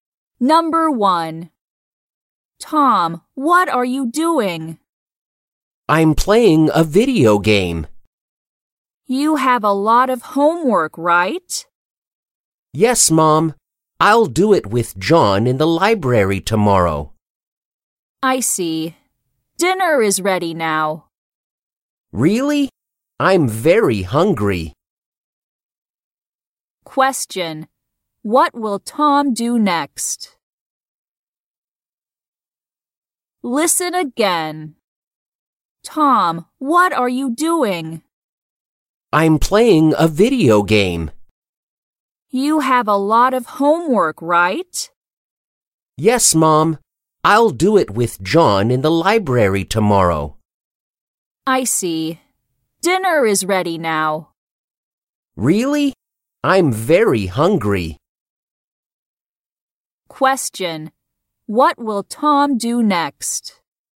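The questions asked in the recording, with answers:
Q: What will Tom do next?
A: He will eat dinner.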